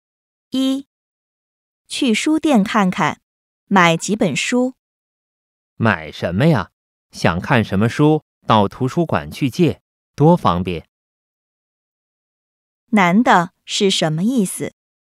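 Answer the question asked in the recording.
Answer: 不用买书,去图书馆借书更方便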